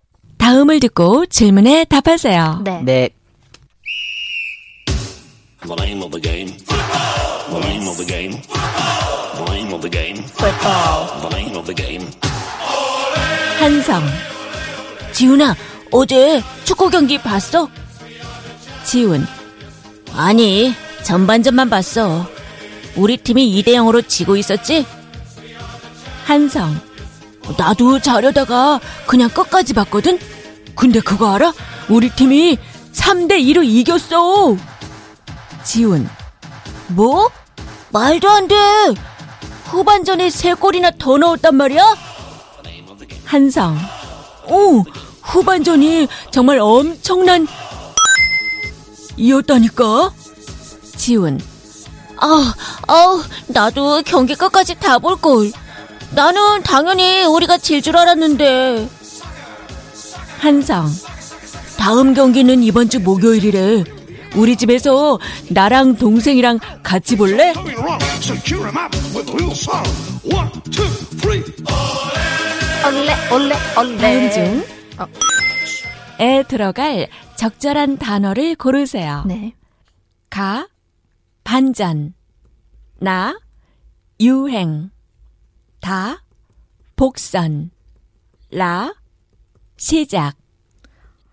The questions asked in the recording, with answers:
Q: 다음 중 에 들어갈 적절한 단어를 고르세요.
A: We picked Ka, which is